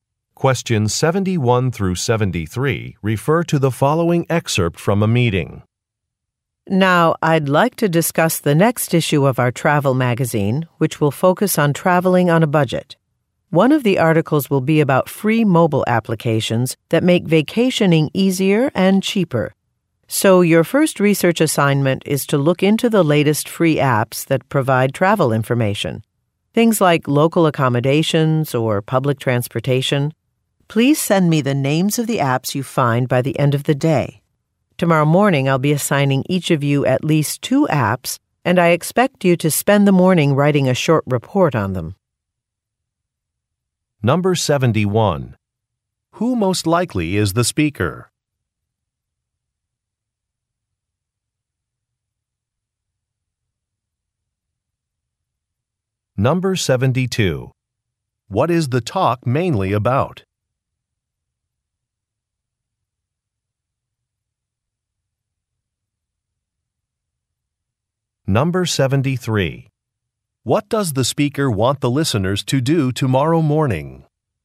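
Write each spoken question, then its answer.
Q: Who most likely is the speaker?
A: A magazine editor

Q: What is the talk mainly about?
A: Free travel apps for a magazine article on budget travel

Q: What does the speaker want the listeners to do tomorrow morning?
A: Write short reports on assigned apps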